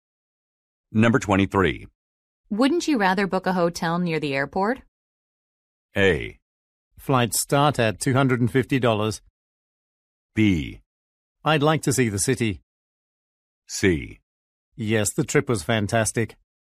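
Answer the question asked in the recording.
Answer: B: I'd like to see the city.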